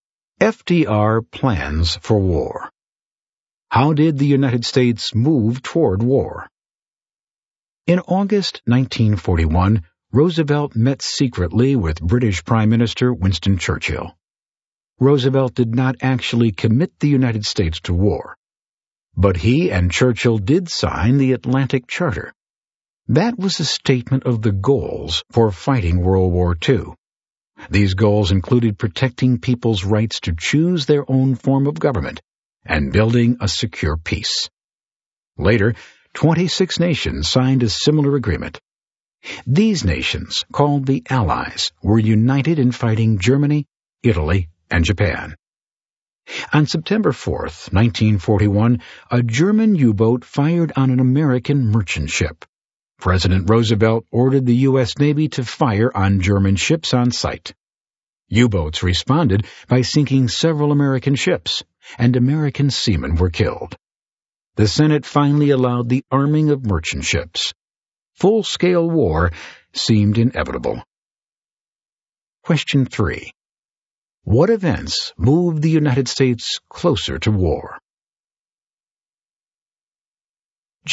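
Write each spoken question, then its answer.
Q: What events moved the United States closer to war?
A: The Atlantic Charter, and U-boat attacks on American ships, which led to orders to fire on German ships and the arming of merchant ships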